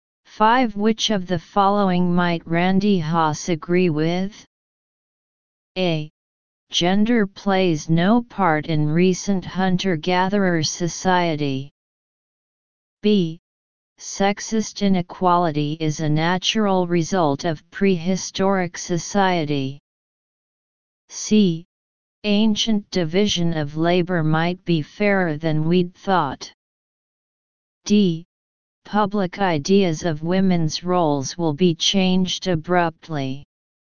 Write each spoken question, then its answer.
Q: Which of the following might Randy Haas agree with?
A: Choose C